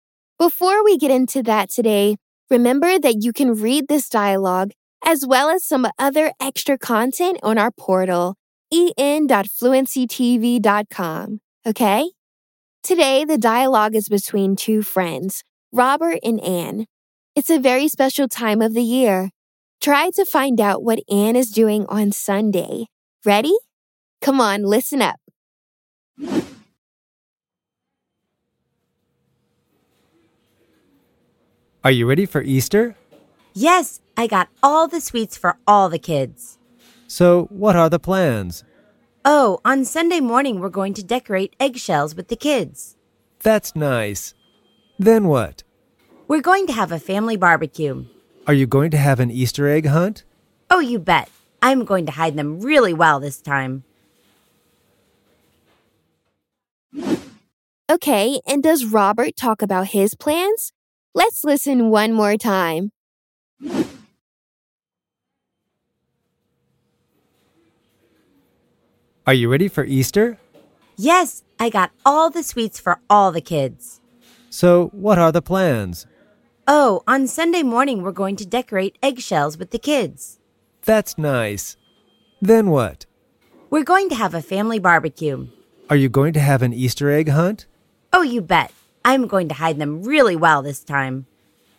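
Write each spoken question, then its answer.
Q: Try to find out what Anne is doing on Sunday.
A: Decorating eggshells with the kids in the morning, then a family barbecue and an Easter egg hunt

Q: Okay, and does Robert talk about his plans?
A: No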